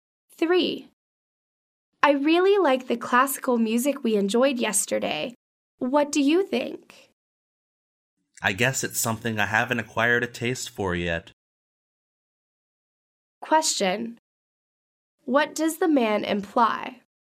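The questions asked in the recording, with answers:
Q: What does the man imply?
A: He doesn't really like classical music yet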